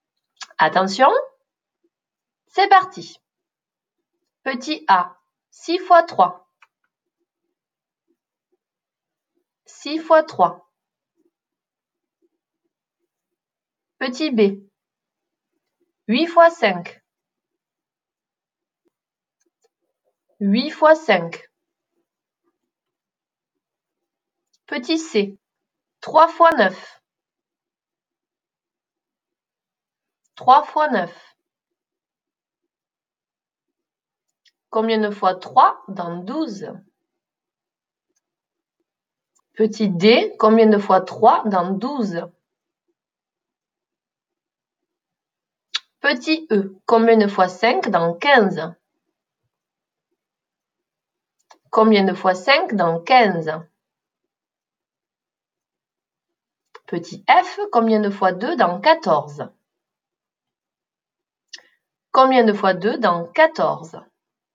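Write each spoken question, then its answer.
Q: 6 fois 3.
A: 18

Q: 8 fois 5.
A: 40

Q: 3 fois 9.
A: 27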